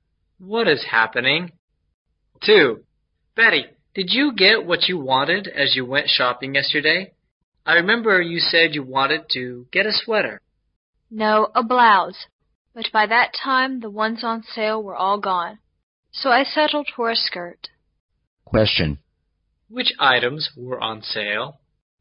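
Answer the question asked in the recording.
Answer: Blouses.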